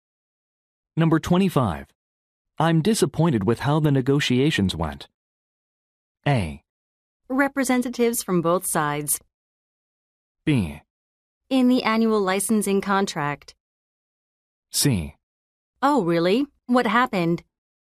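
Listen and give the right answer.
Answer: C: Oh, really? What happened?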